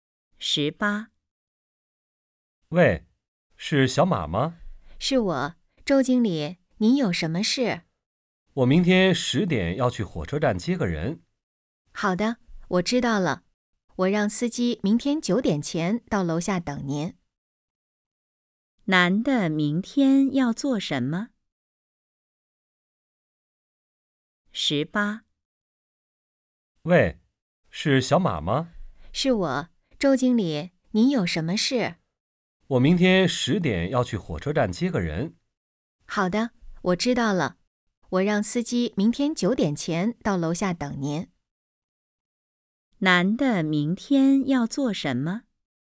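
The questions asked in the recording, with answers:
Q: 男的明天要做什么?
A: 去火车站接人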